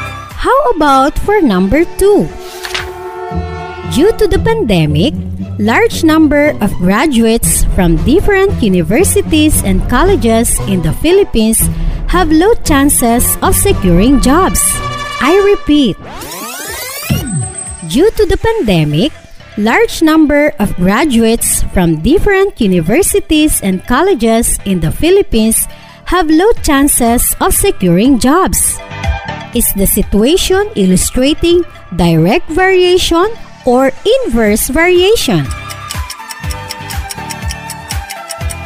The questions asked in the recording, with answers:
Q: Is the situation illustrating direct variation or inverse variation.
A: Inverse variation, madam.